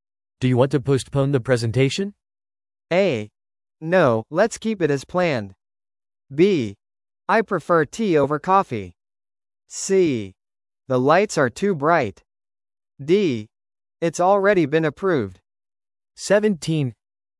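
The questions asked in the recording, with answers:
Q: Do you want to postpone the presentation?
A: A: No, let's keep it as planned.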